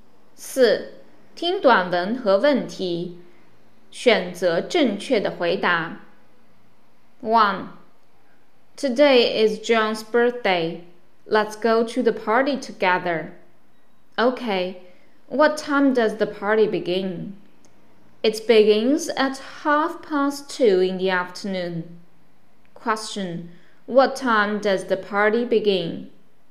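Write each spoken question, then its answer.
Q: Question what time does the party begin?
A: At half past two in the afternoon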